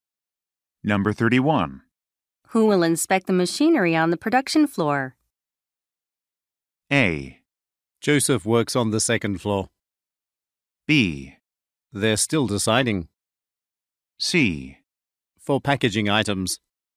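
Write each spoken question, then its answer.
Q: Who will inspect the machinery on the production floor?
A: B: They're still deciding.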